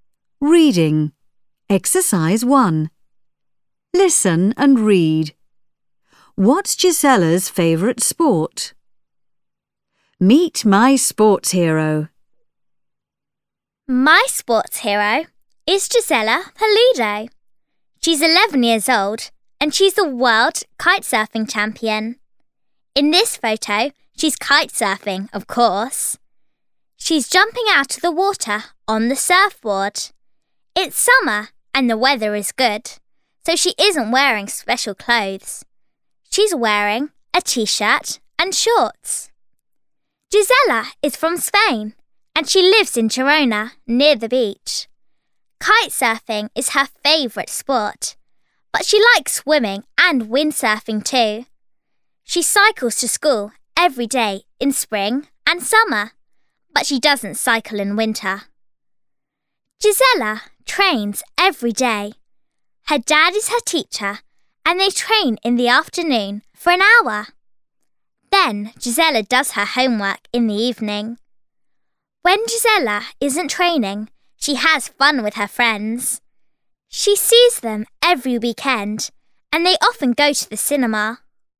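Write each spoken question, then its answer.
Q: What's Gisella's favourite sport?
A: Kite surfing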